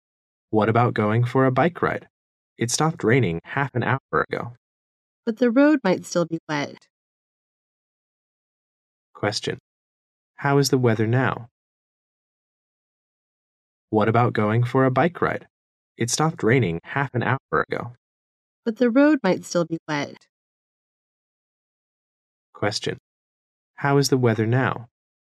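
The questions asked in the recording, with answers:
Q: How is the weather now?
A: It has stopped raining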